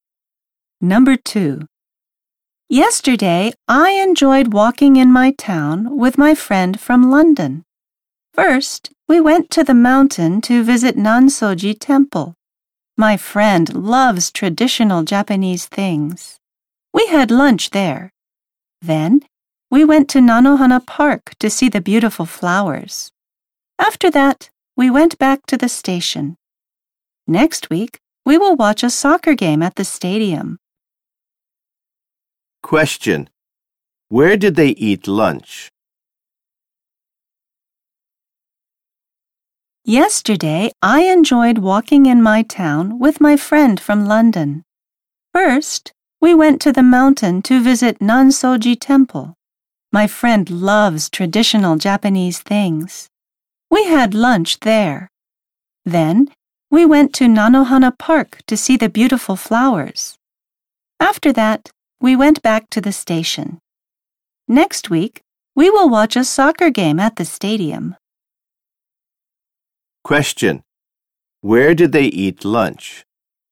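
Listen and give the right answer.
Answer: At Nansoji Temple.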